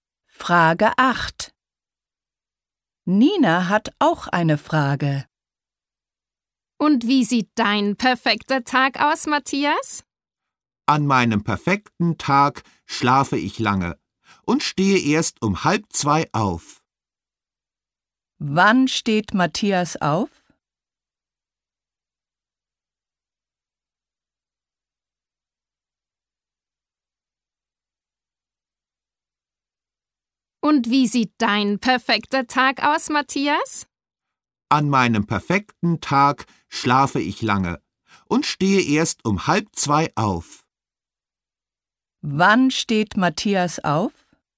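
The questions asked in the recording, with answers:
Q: Wann steht Matthias auf?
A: Um 1:30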